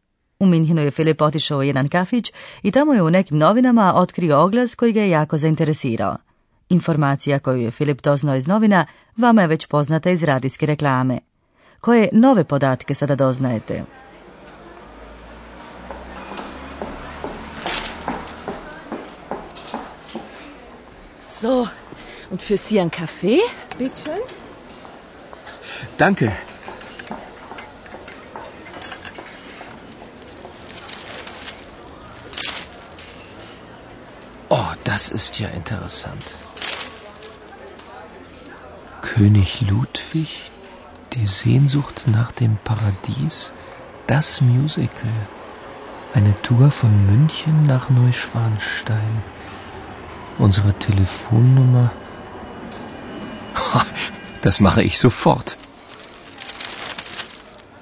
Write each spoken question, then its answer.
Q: Koje nove podatke sada doznajete?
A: Novi podatak je da se nudi izlet u dvorac Neuschwanstein.